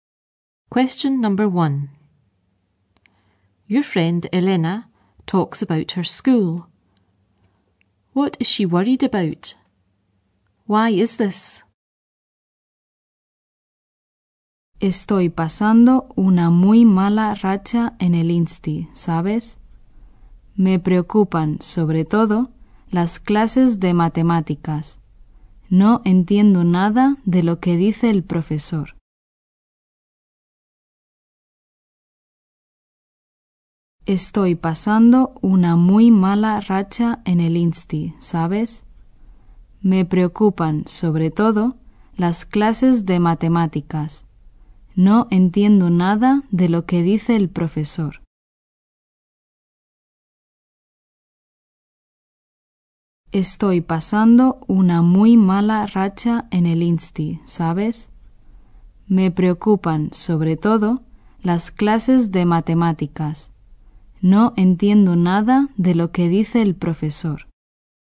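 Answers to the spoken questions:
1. Her maths classes
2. She doesn't understand anything the teacher says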